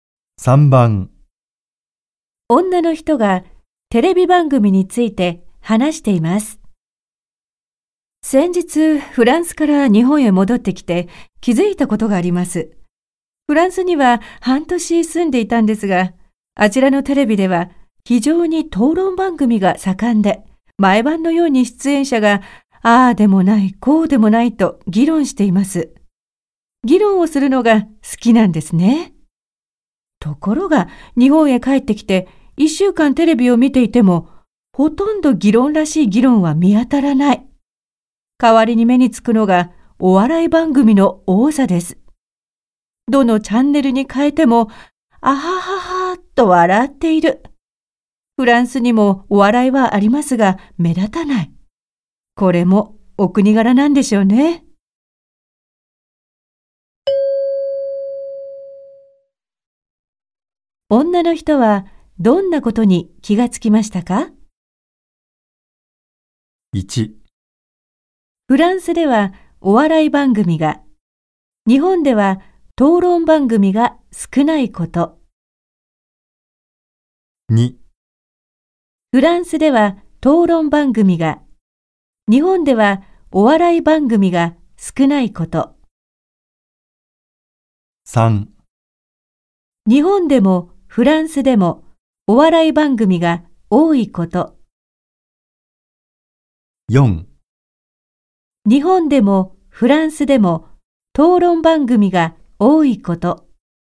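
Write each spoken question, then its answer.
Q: 女の人はどんなことに気がつきましたか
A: 1: フランスではお笑い番組が、日本では討論番組が少ないこと。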